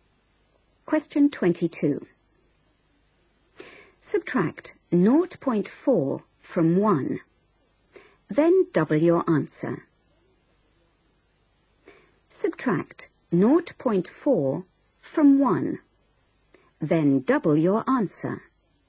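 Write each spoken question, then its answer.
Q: Subtract 0.4 from 1, then double your answer.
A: 1.2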